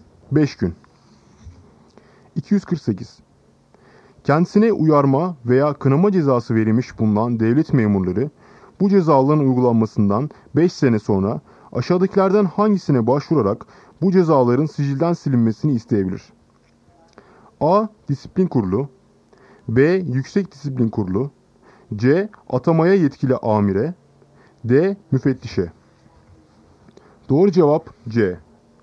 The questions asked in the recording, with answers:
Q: Kendisine uyarma veya kınama cezası verilmiş bulunan devlet memurları bu cezaların uygulanmasından 5 sene sonra aşağıdakilerden hangisine başvurarak bu cezaların sicilden silinmesini isteyebilir?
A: Doğru cevap C. Atamaya yetkili amire.